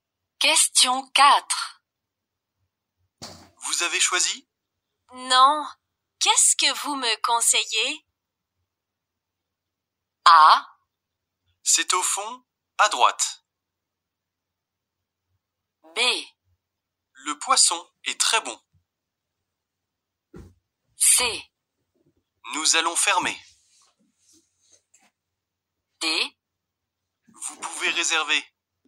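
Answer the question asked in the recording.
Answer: B: Le poisson est très bon.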